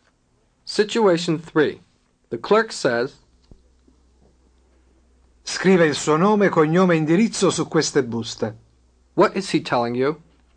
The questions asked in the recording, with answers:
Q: What is he telling you?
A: Write your name, surname and address on these envelopes.